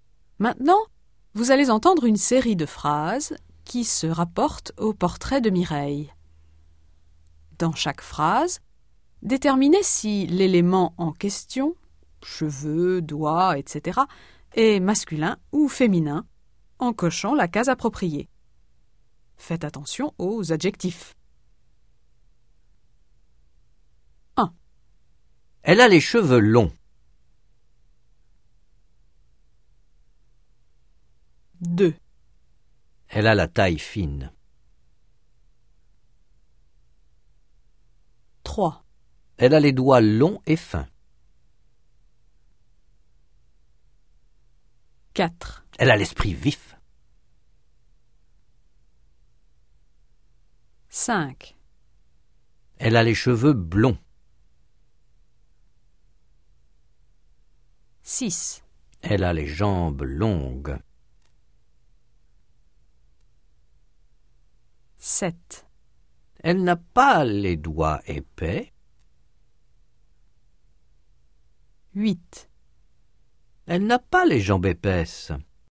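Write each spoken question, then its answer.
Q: Elle a les cheveux longs.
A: masculin

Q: Elle a la taille fine.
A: féminin

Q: Elle a les doigts longs et fins.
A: masculin

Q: Elle a l'esprit vif.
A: masculin

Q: Elle a les cheveux blonds.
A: masculin

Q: Elle a les jambes longues.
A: féminin

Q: Elle n'a pas les doigts épais.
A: masculin

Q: Elle n'a pas les jambes épaisses.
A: féminin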